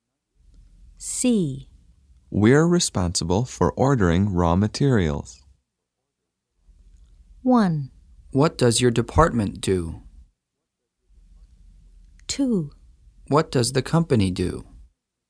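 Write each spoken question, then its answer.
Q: We're responsible for ordering raw materials.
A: 1: What does your department do?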